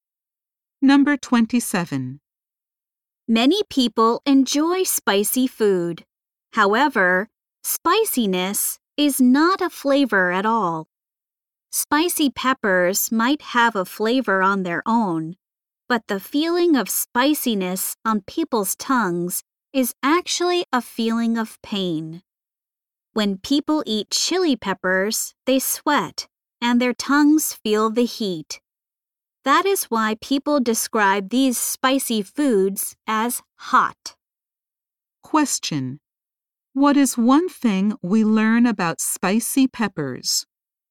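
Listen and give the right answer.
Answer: Their spiciness is actually a feeling of pain, not a flavor.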